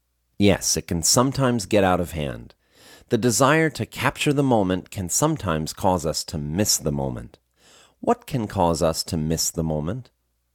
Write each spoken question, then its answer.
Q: What can cause us to miss the moment?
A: The desire to capture the moment can cause us to miss the moment.